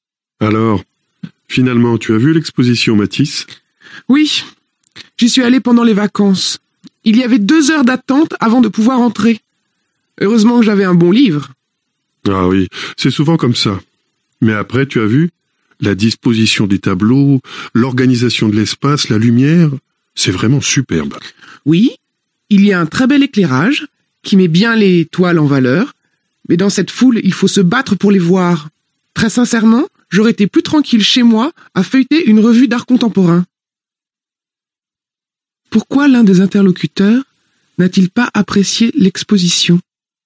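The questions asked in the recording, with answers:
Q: Pourquoi l'un des interlocuteurs n'a-t-il pas apprécié l'exposition?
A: Parce qu'il y avait trop de monde (la foule, deux heures d'attente).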